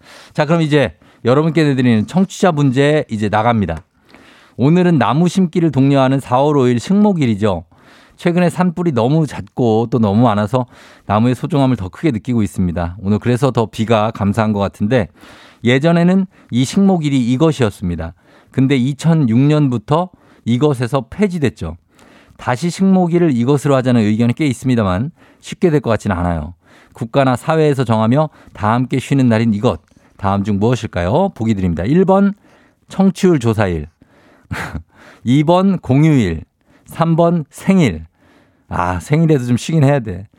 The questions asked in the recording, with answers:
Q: 국가나 사회에서 정하며 다 함께 쉬는 날인 이것.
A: 정답 바로 공휴일입니다.